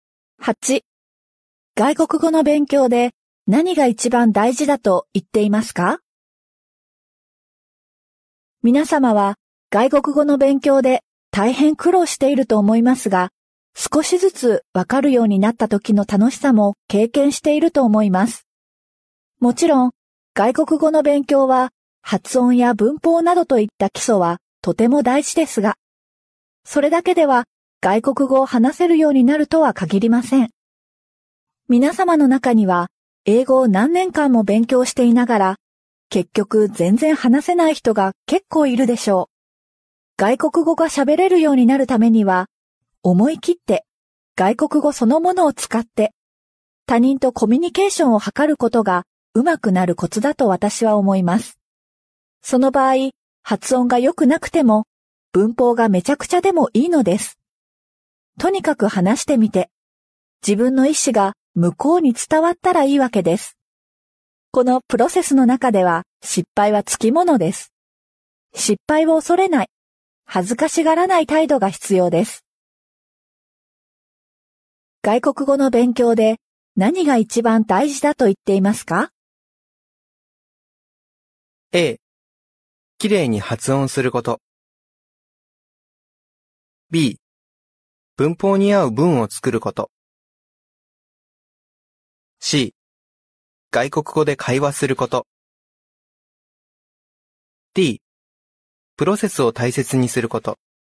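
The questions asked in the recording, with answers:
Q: 外国語の勉強で何が一番大事だと言っていますか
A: C: 外国語で会話すること。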